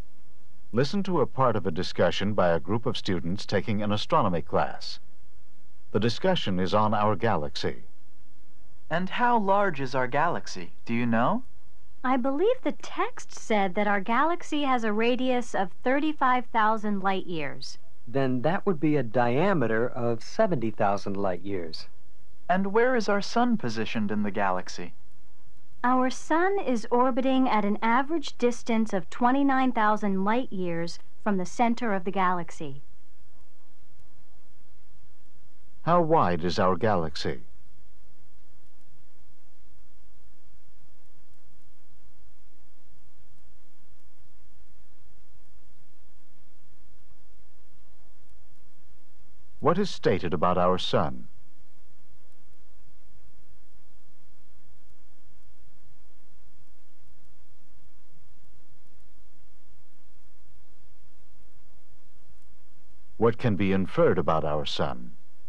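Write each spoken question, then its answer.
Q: How wide is our galaxy?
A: About 70,000 light years in diameter

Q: What is stated about our sun?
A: It orbits about 29,000 light years from the center of the galaxy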